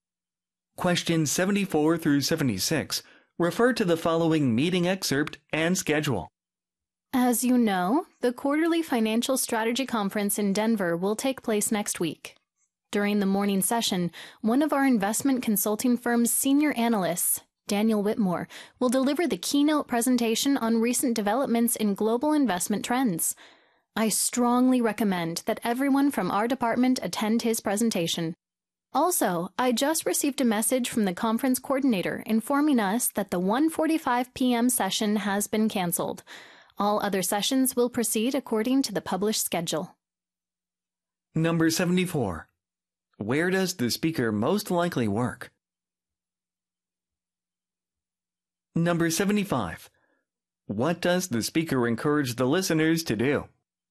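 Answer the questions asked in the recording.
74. At an investment consulting firm
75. Attend Daniel Whitmore's keynote presentation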